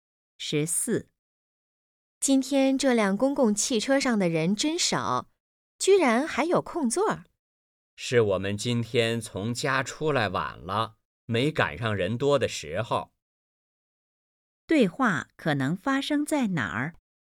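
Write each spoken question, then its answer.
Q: 对话可能发生在哪儿?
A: 公共汽车上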